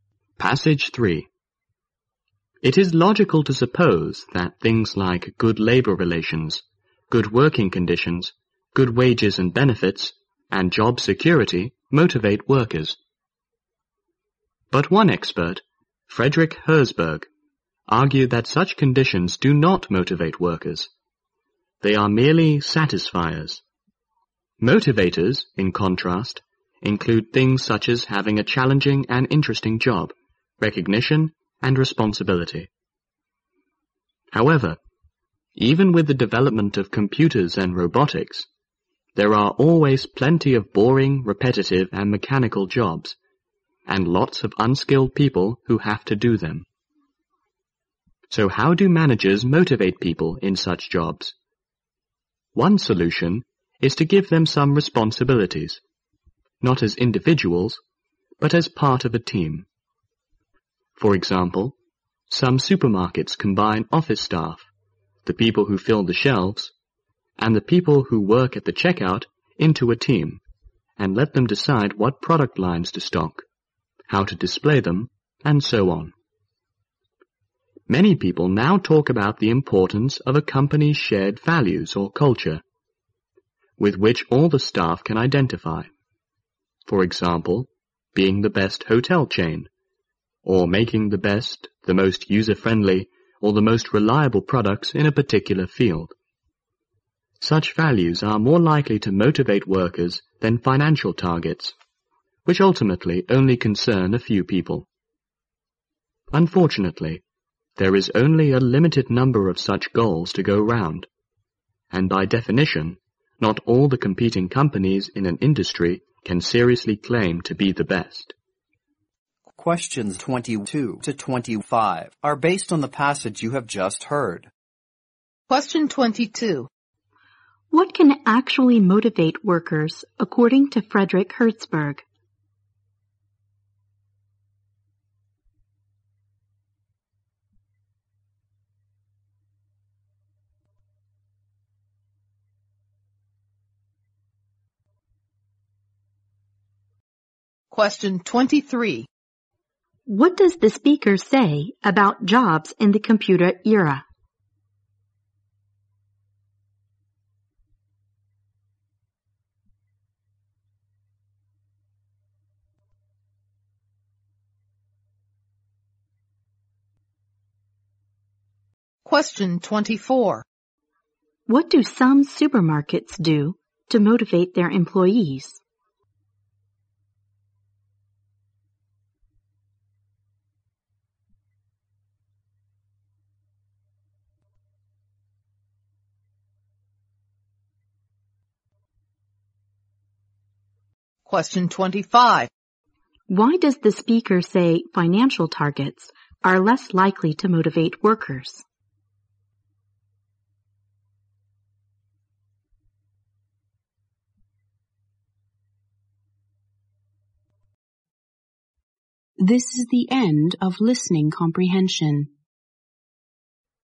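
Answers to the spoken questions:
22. A challenging and interesting job, recognition and responsibility.
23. There are still plenty of boring, repetitive and mechanical jobs.
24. They put staff into teams and let the teams decide which products to stock and how to display them.
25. Because they ultimately concern only a few people.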